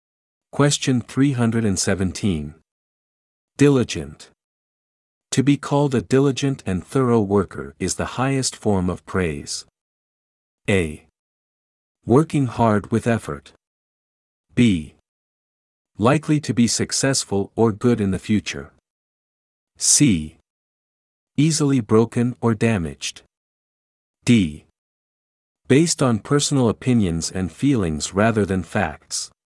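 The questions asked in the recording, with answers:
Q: Diligent. To be called a diligent and thorough worker is the highest form of praise.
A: A: Working hard with effort.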